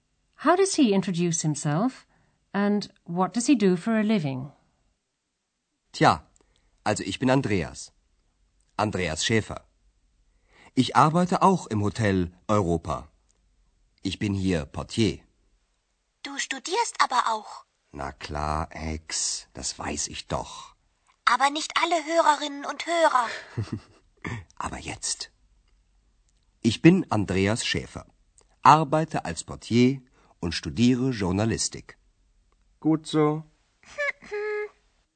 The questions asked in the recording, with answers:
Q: How does he introduce himself, and what does he do for a living?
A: He's the porter.